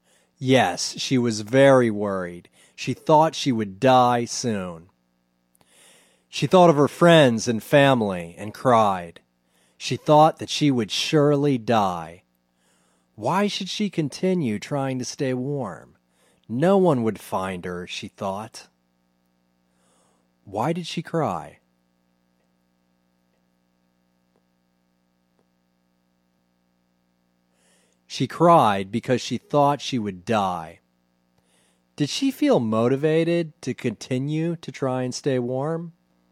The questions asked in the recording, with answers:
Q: Did she feel motivated to continue to try and stay warm?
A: No, she didn't feel motivated.